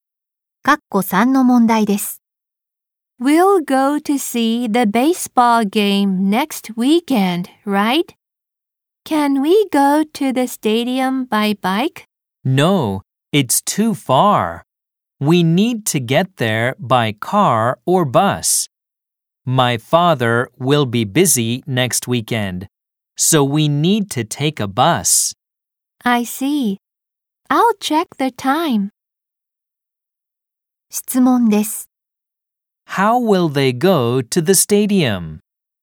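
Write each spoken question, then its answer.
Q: How will they go to the stadium?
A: By bus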